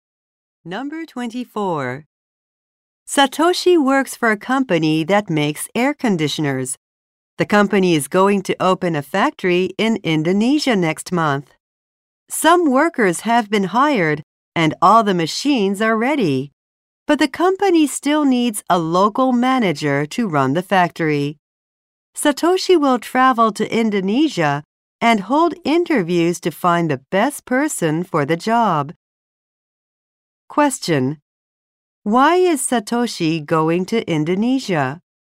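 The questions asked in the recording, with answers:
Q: Why is Satoshi going to Indonesia?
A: To interview people for a factory manager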